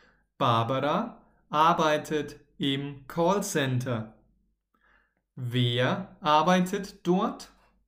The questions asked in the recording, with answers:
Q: Wer arbeitet dort?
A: Barbara. Barbara arbeitet dort.